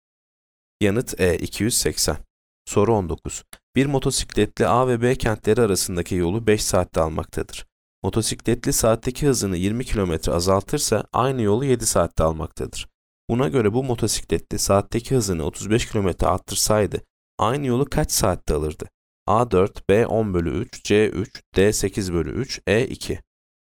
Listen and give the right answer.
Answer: Yanıt B 10/3.